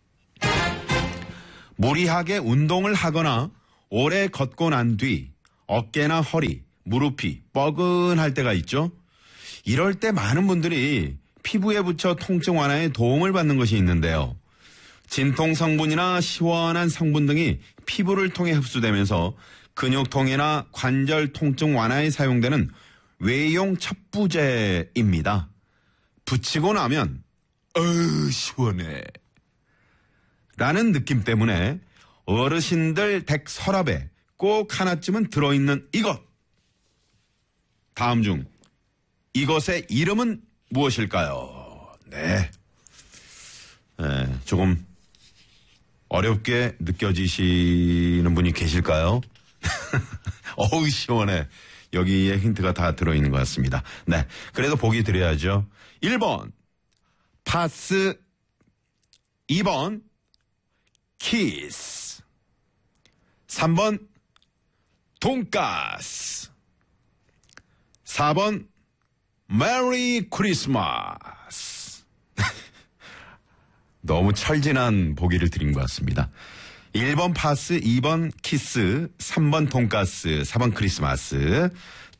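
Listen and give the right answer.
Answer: 1: 파스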